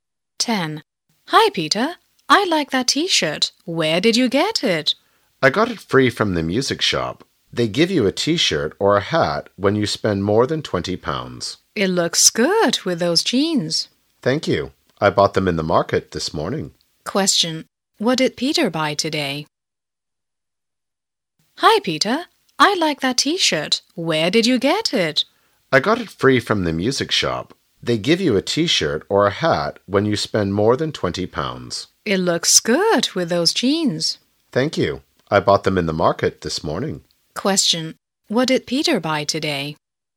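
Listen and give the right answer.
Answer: Jeans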